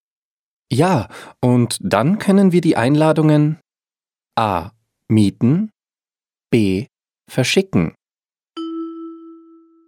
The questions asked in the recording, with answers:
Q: Ja, und dann können wir die Einladungen A.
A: B. Ja, und dann können wir die Einladungen verschicken.